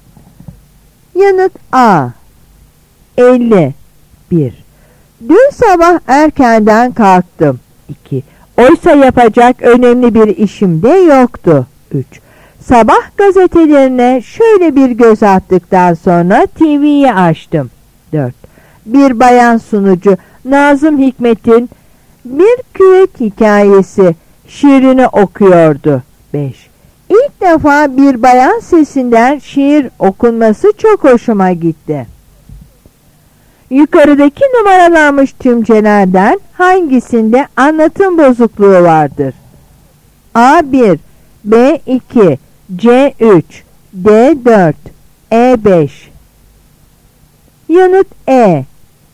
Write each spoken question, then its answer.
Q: Yukarıdaki numaralanmış tümcelerden hangisinde anlatım bozukluğu vardır?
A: Yanıt E.